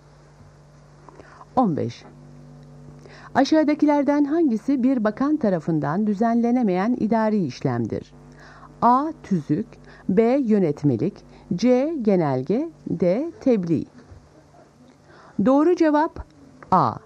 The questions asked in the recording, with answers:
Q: Aşağıdakilerden hangisi bir bakan tarafından düzenlenemeyen idari işlemdir?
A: Doğru cevap A. Tüzük.